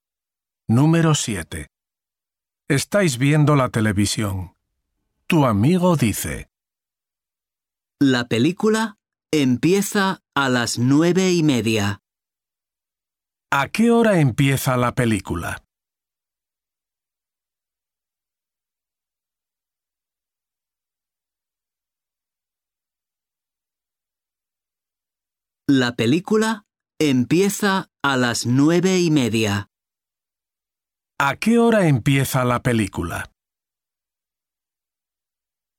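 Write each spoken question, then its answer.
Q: ¿A qué hora empieza la película?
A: a las 9:30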